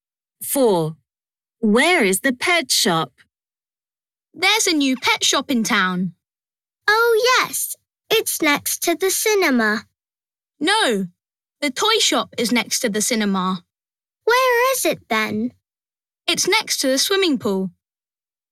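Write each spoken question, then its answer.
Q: Where is the pet shop?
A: next to the swimming pool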